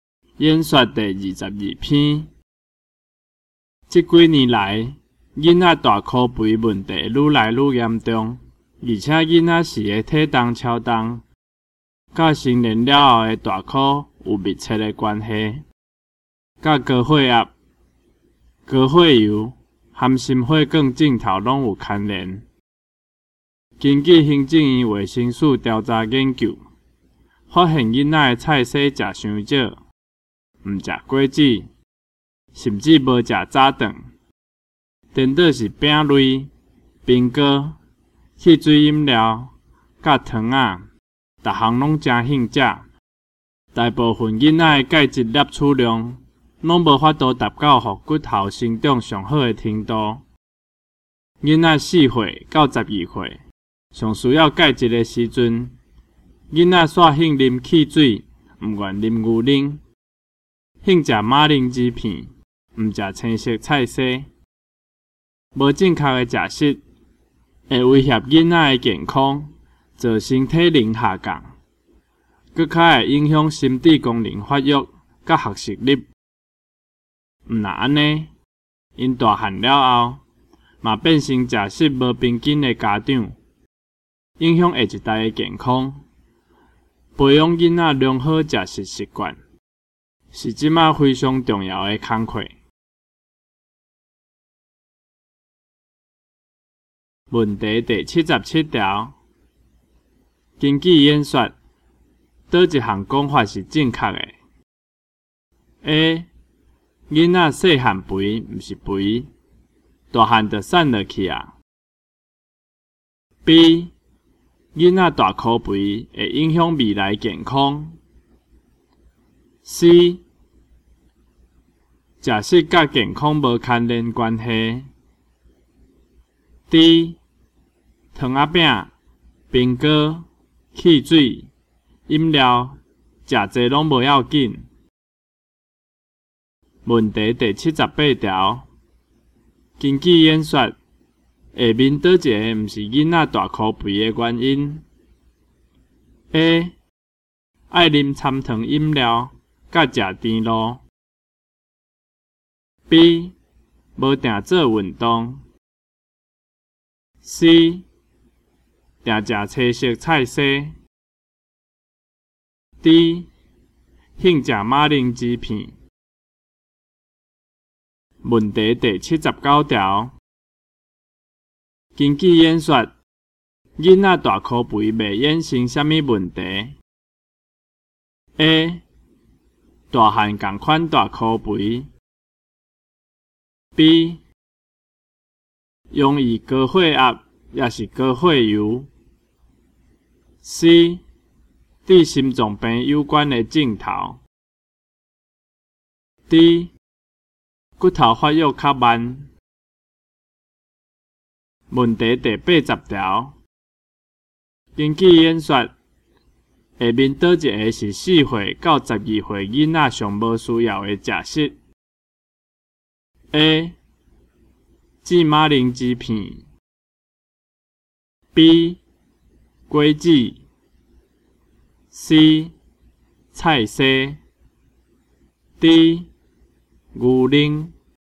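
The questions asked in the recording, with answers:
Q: 根据演说,倒一项讲法是正确的 ?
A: B: 囡仔大口肥会影响未来健康。

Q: 根据演说,下面倒一个毋是囡仔大口肥的原因 ?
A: C: 定食青色菜色。

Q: 根据演说,下面倒一个是四岁到十二岁囡仔上无需要的食食 ?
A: A: 芝麻铃薯片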